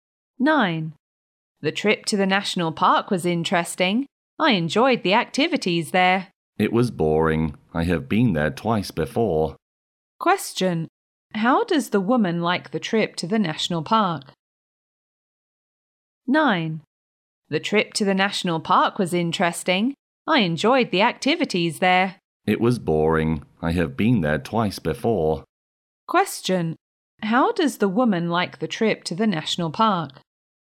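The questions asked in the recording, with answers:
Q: How does the woman like the trip to the national park?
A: She thinks it was boring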